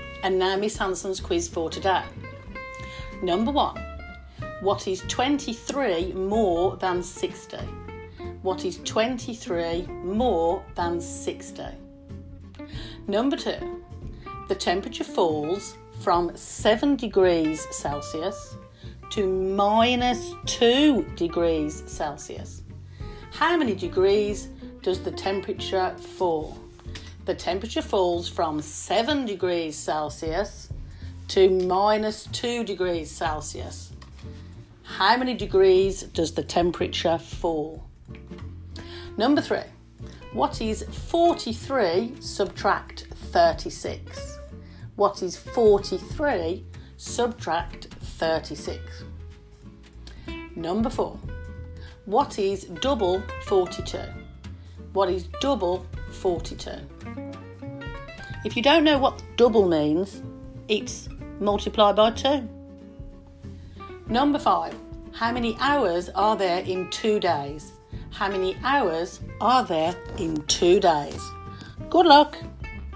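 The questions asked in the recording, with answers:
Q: what is 23 more than 60?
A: 83

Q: How many degrees does the temperature fall?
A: 9 degrees

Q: What is double 42?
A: 84

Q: How many hours are there in 2 days?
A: 48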